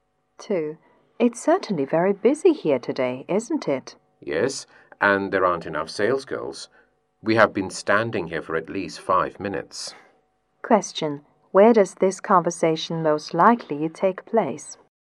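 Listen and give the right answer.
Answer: In a store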